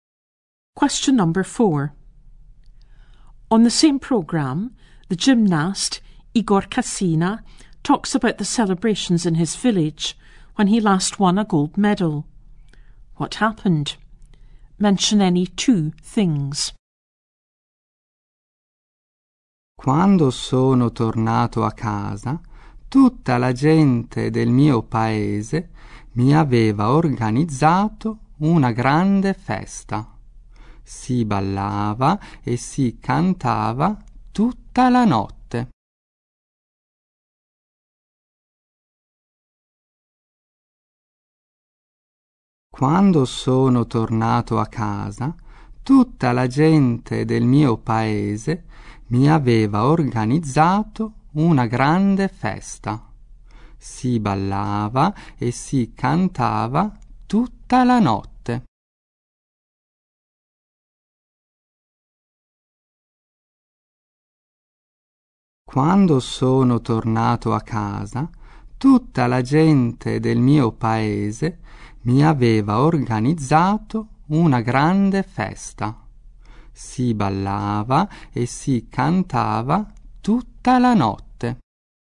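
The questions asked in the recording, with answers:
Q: What happened? Mention any two things.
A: The villagers organised a big party; people danced and sang all night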